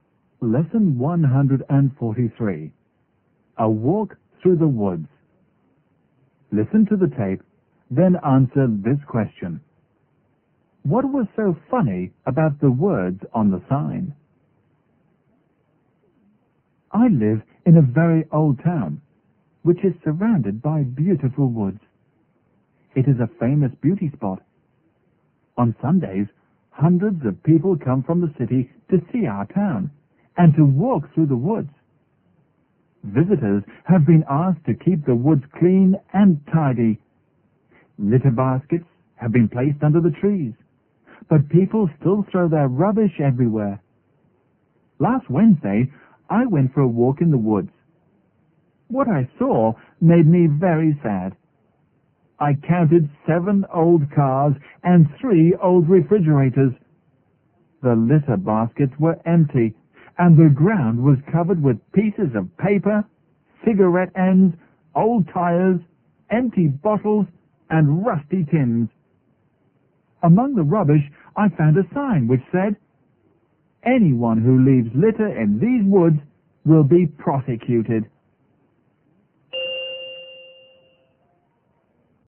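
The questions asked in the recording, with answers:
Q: What was so funny about the words on the sign?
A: The sign warning that litterers would be prosecuted was itself lying among the rubbish.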